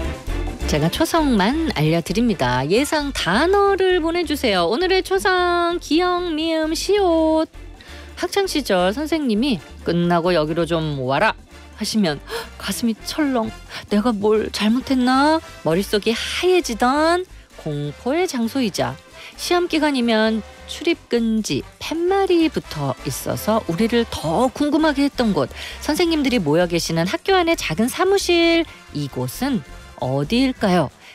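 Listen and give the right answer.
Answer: 교무실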